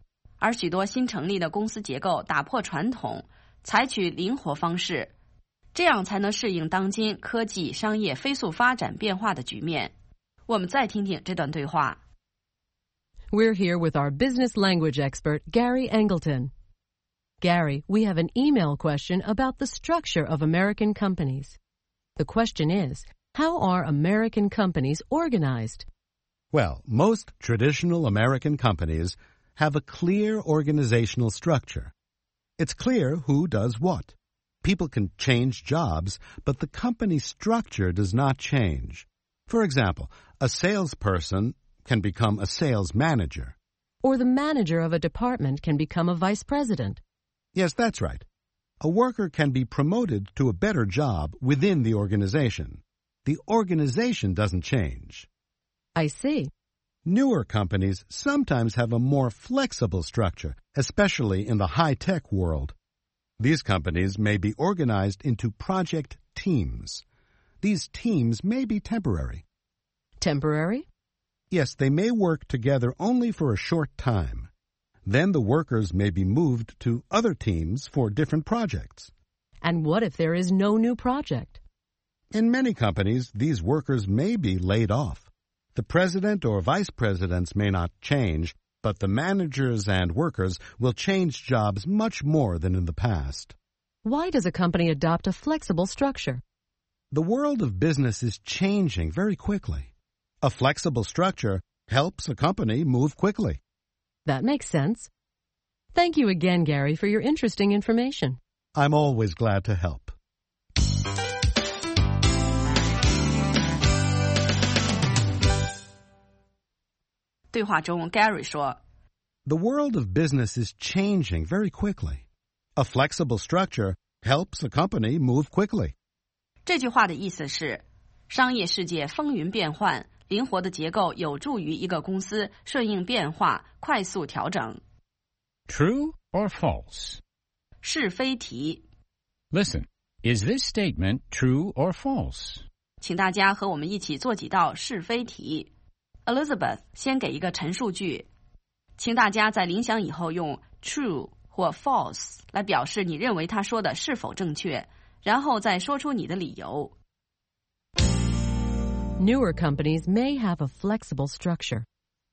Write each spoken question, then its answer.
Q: Newer companies may have a flexible structure.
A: True. Newer companies, especially high-tech companies, often have a more flexible structure than traditional companies.